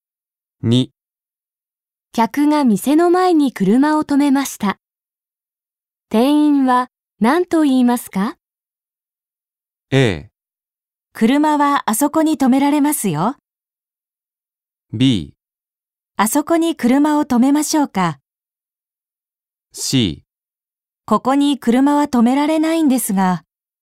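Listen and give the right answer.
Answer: C: ここに車は止められないんですが。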